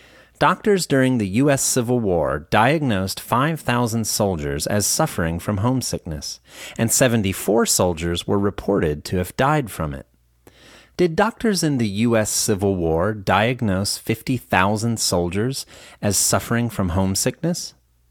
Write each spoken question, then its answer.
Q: Did doctors in the U.S. Civil War diagnose 50,000 soldiers as suffering from homesickness?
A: No, they didn't. They diagnosed 5,000 soldiers as suffering from homesickness.